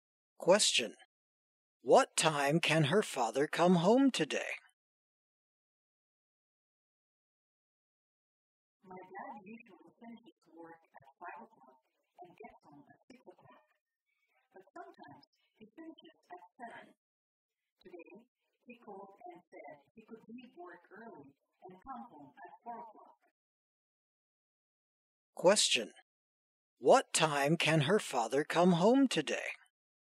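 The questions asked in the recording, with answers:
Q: What time can her father come home today?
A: At 4 o'clock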